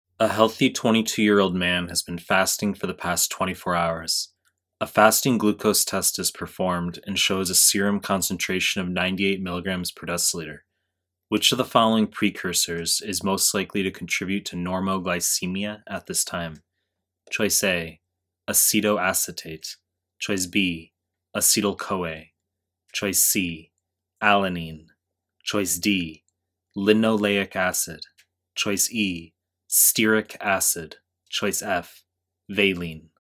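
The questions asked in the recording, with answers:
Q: Which of the following precursors is most likely to contribute to normoglycemia at this time?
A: C: alanine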